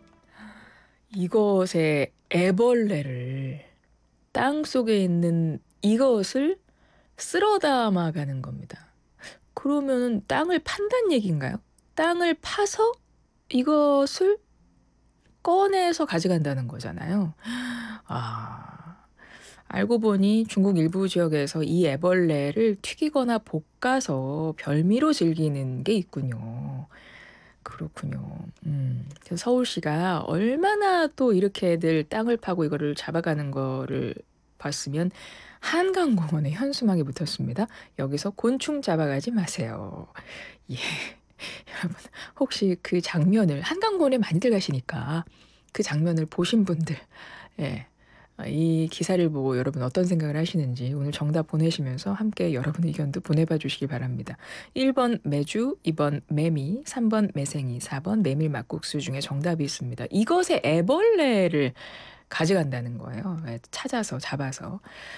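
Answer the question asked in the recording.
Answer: 2: 매미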